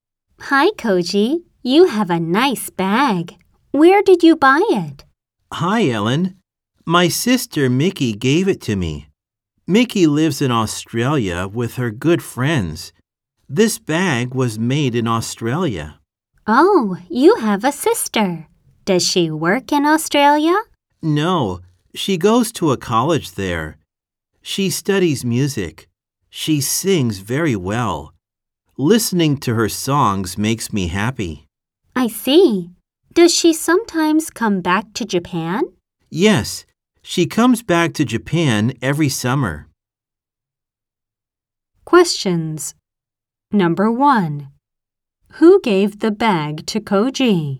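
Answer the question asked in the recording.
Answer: His sister Mickey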